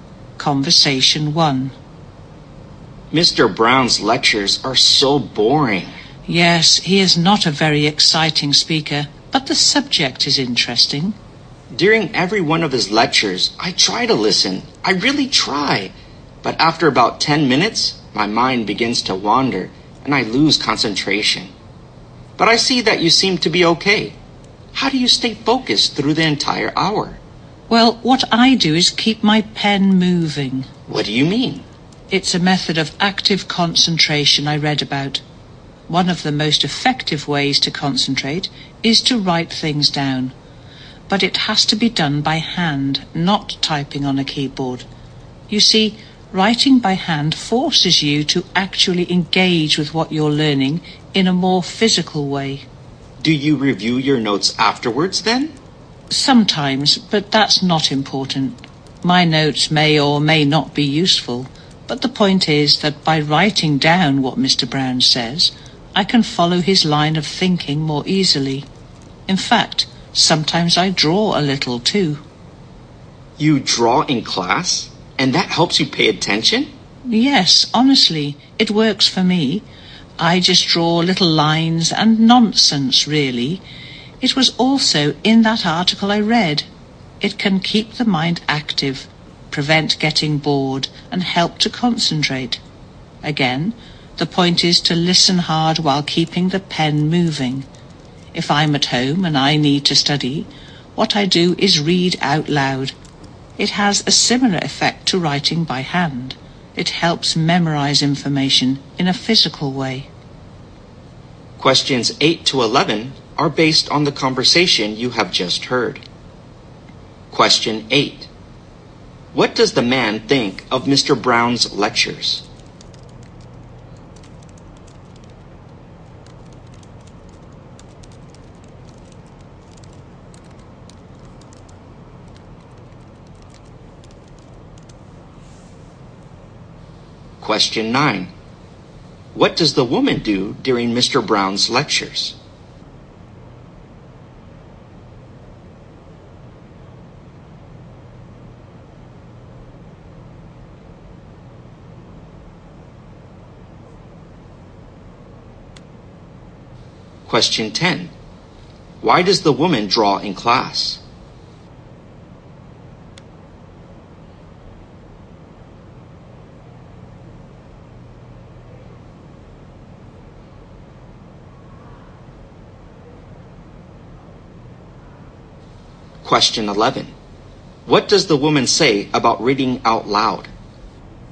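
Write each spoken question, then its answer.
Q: What does the man think of Mr. Brown's lectures?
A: They are boring

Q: What does the woman do during Mr. Brown's lectures?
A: She keeps her pen moving by writing notes by hand

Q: Why does the woman draw in class?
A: It keeps her mind active and helps her concentrate

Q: What does the woman say about reading out loud?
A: It helps her memorize information, like writing by hand does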